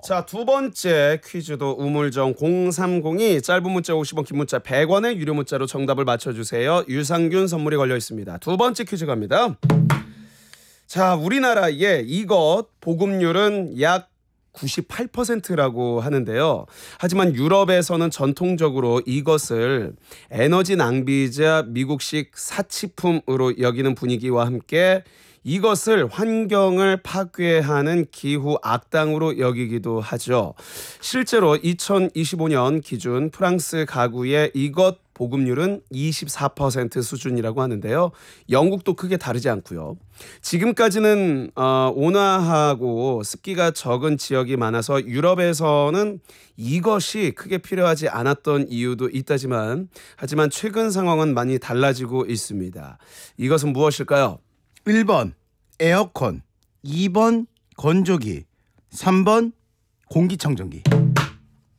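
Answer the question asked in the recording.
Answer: 1번: 에어컨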